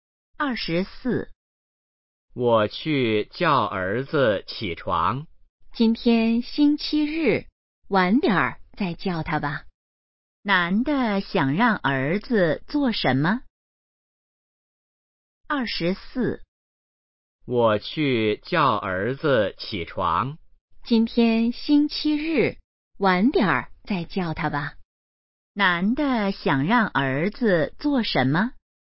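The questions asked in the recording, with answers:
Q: 男的想让儿子做什么?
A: 起床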